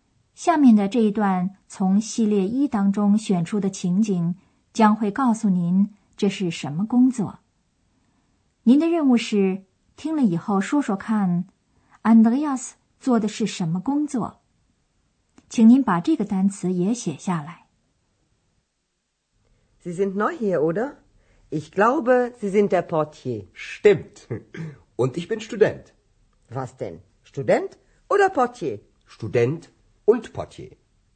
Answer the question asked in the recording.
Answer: 他是门房 Portier。